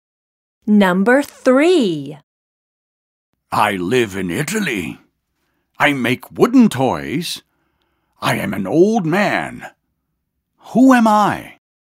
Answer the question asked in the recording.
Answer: I am Geppetto.